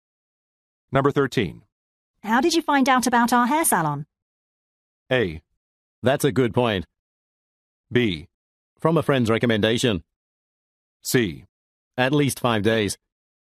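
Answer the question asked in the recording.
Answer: B: From a friend's recommendation.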